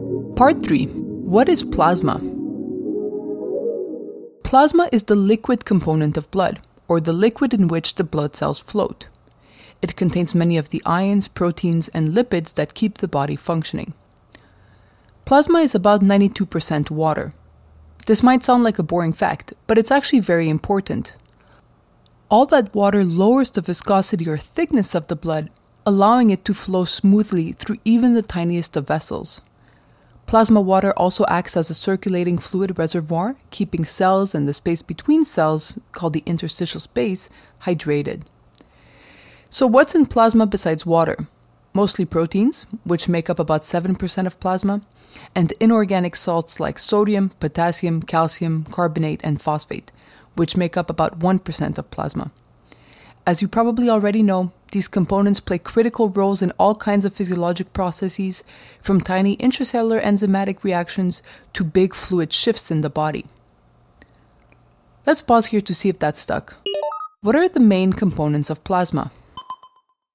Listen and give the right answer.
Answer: Water makes up 92% of plasma, proteins 7%, and inorganic salts make up the final 1% of plasma volume.